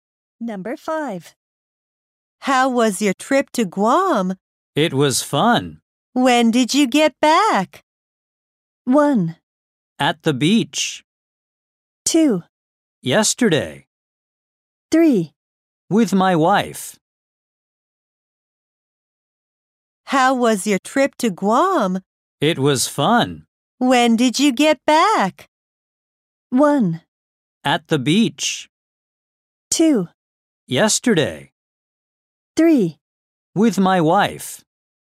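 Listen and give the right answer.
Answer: 2: Yesterday.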